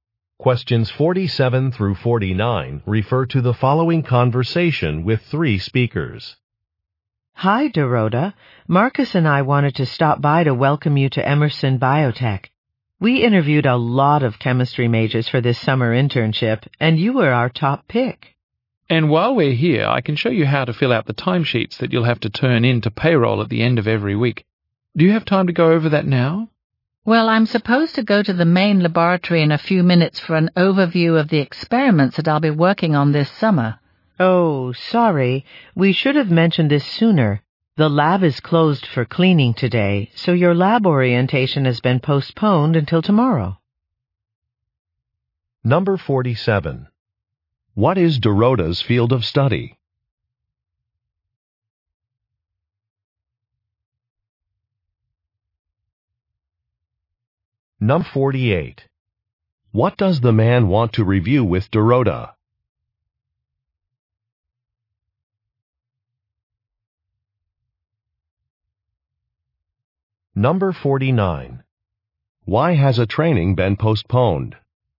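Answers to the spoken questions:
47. Chemistry
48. How to fill out timesheets
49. The lab is closed for cleaning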